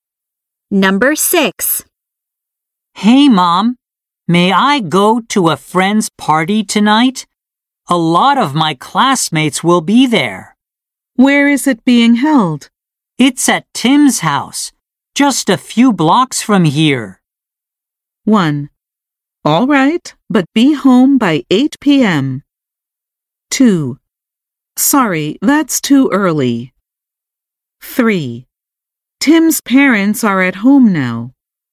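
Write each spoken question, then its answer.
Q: It's at Tim's house, just a few blocks from here.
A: 1: All right, but be home by 8 p.m.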